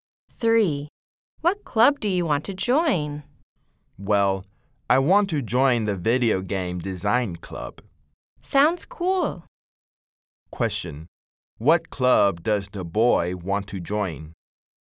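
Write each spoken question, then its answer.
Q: What club does the boy want to join?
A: The Video Game Design Club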